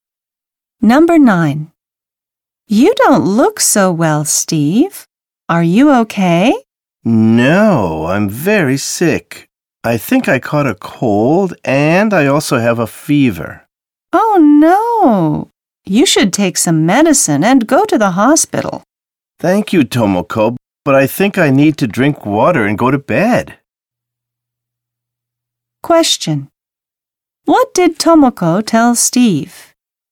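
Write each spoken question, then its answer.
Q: What did Tomoko tell Steve?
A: To take some medicine and go to the hospital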